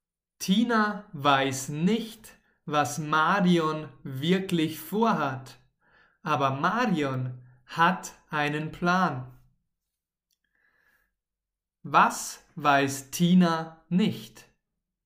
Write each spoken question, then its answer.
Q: Was weiß Tina nicht?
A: Was Marion wirklich vorhat.